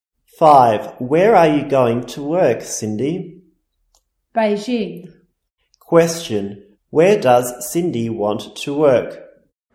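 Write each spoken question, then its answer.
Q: Where does Cindy want to work?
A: Beijing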